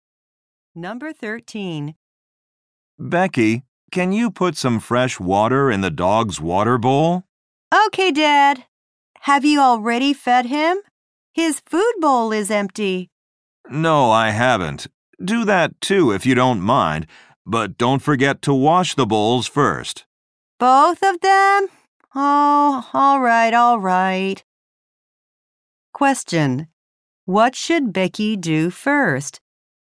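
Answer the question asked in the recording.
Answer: Wash the dog's bowls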